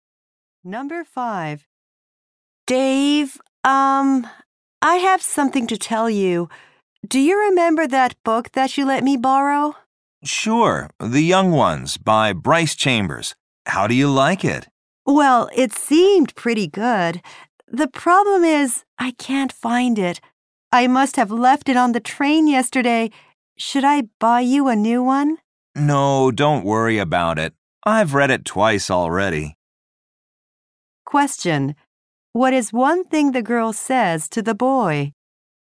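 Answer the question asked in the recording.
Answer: She lost his book on the train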